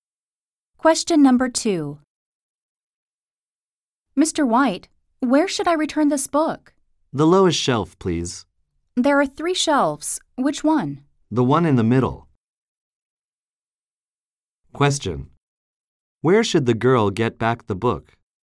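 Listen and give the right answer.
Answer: On the middle shelf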